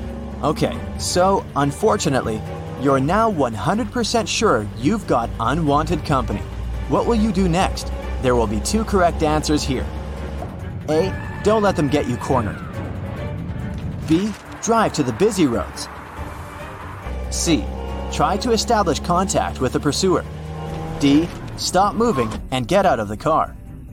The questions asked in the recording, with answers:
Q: What will you do next?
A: A and B are what you should do.